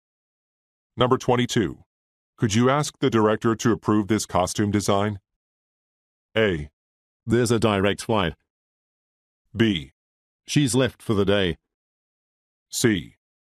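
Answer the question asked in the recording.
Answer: B: She's left for the day.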